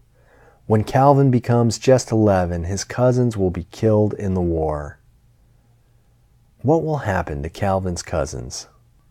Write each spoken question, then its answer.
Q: What will happen to Calvin's cousins?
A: Calvin's cousins will be killed in the war.